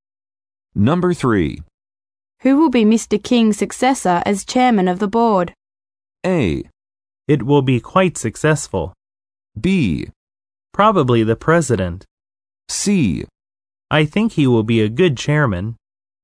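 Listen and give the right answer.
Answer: B: Probably the president.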